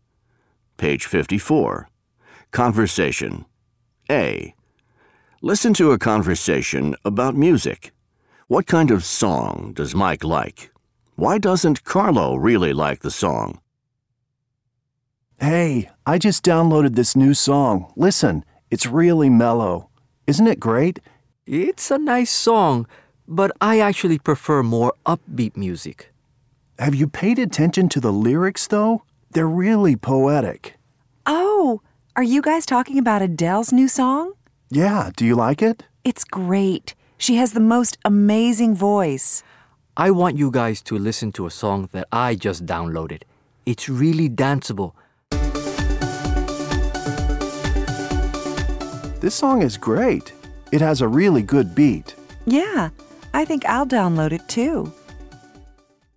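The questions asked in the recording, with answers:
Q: Why doesn't Carlo really like the song?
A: He prefers more upbeat music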